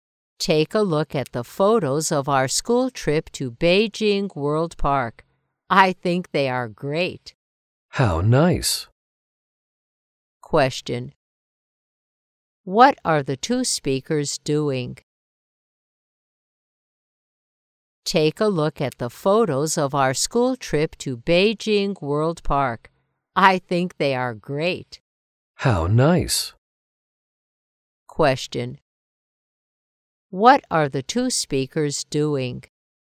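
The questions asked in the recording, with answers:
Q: What are the two speakers doing?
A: Looking at photos of a school trip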